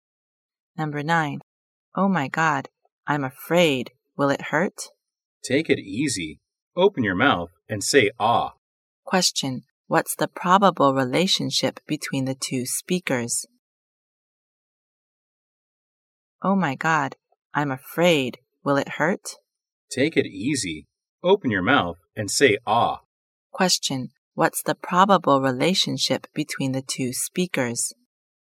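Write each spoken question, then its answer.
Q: Question. What's the probable relationship between the two speakers?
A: Dentist (doctor) and patient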